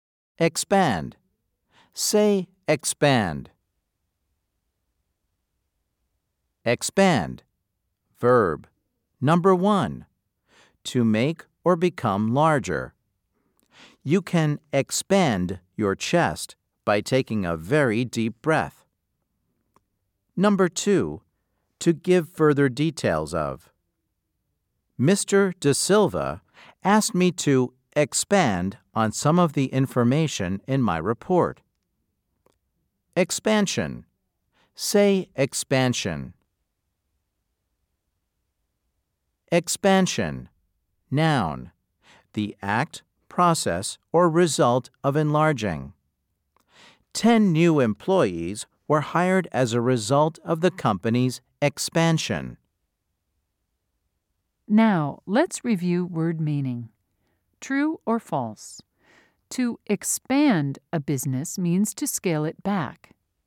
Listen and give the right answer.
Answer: If you said false, you are right.